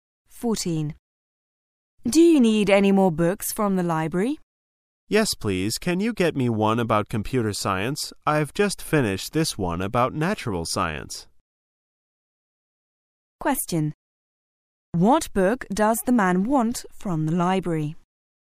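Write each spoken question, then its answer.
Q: What book does the man want from the library?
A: One about computer science

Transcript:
[解析] W: Do you need any more books from the library? M: Yes, please. Can you get me one about computer science? I've just finished this one about natural science. Q: What book does the man want from the library?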